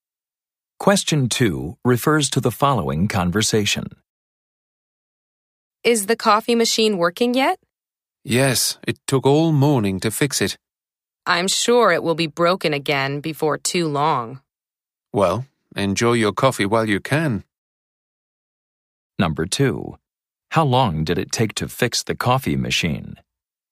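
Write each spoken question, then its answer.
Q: How long did it take to fix the coffee machine?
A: All morning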